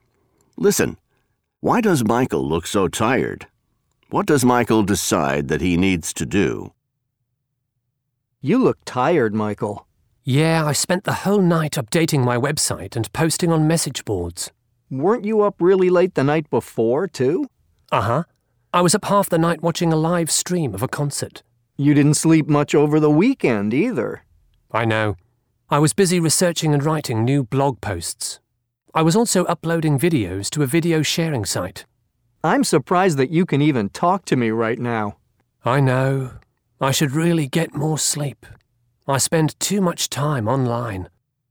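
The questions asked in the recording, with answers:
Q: Why does Michael look so tired?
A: He spent the whole night updating his website and posting on message boards (he has been online too much).

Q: What does Michael decide that he needs to do?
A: He needs to get more sleep (he spends too much time online).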